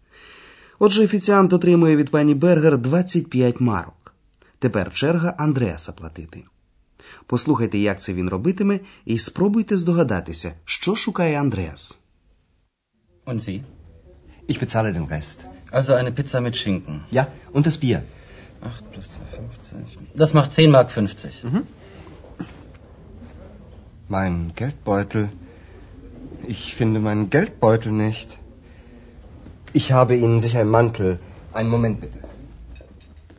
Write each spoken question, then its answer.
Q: спробуйте здогадатися, що шукає Андреас.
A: А вони, звісно, знаходяться у гельдбойтель – тобто в гаманці.